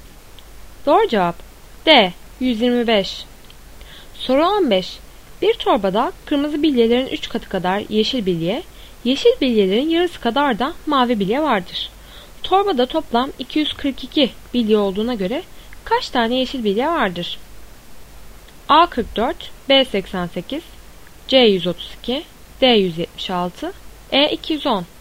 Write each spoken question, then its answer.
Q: Torbada toplam 242 bilye olduğuna göre kaç tane yeşil bilye vardır?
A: Doğru cevap C 132.